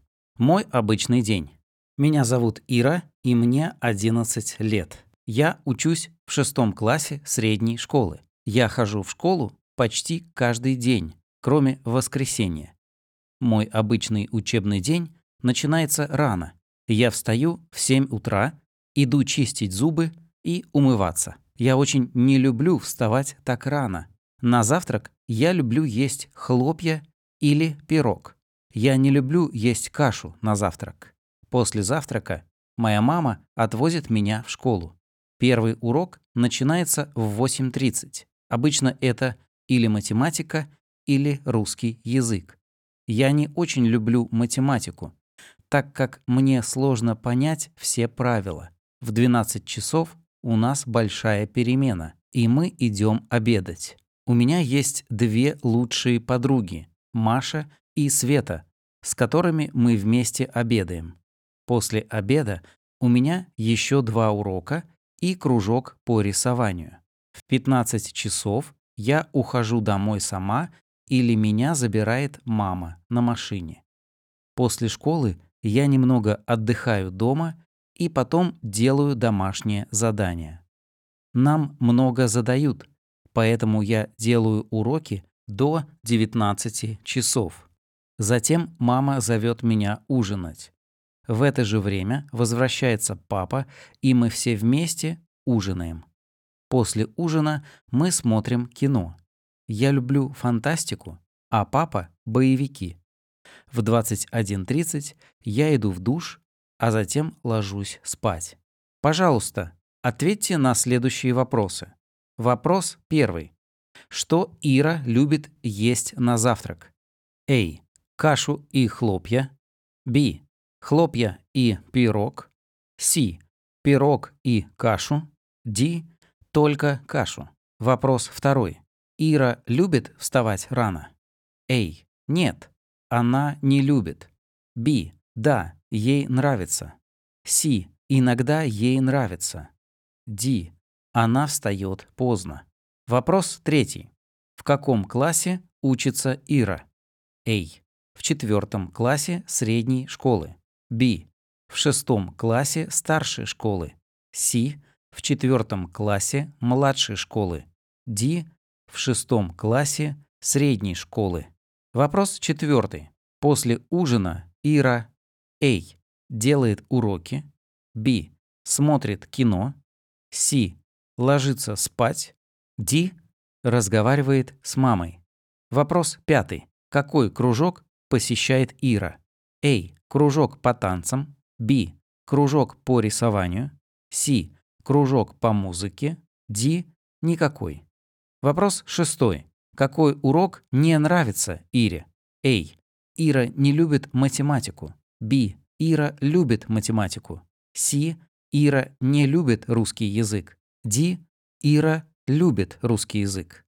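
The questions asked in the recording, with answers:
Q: Что Ира любит есть на завтрак?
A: B: Хлопья и пирог.

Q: Ира любит вставать рано?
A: А: Нет, она не любит.

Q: В каком классе учится Ира?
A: Д: В 6 классе средней школы.

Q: После ужина Ира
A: Б: Смотрит кино.

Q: Какой кружок посещает Ира?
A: Б: Кружок по рисованию.

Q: Какой урок не нравится Ире?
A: А: Ира не любит математику.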